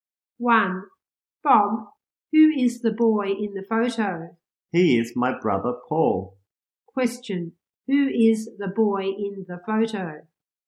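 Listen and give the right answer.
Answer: Paul, Bob's brother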